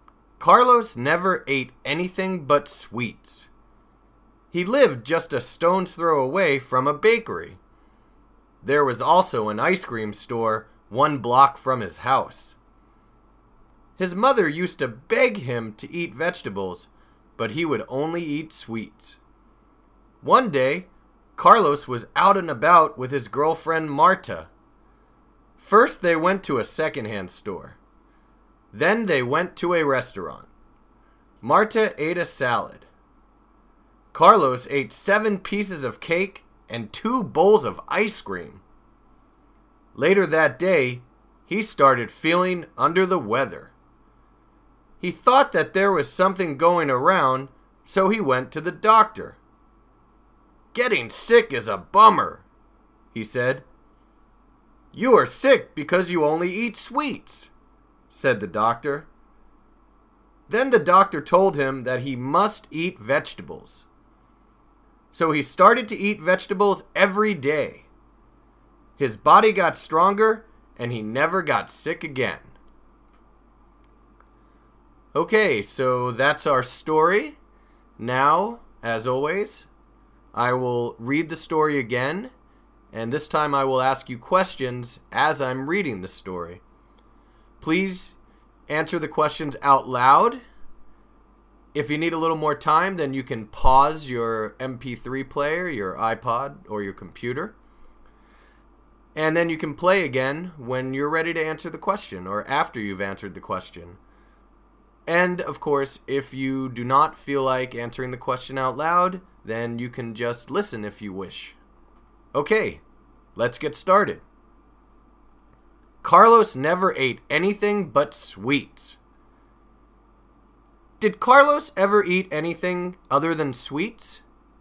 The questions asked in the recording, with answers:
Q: Did Carlos ever eat anything other than sweets?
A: No, he didn't. He never ate anything but sweets.